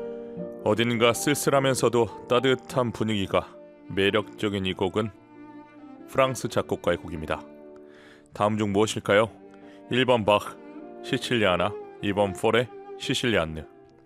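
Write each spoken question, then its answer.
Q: 다음 중 무엇일까요? 1번 바흐 시칠리아나, 2번 포레 시실리안느.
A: 2: 포레 시실리안느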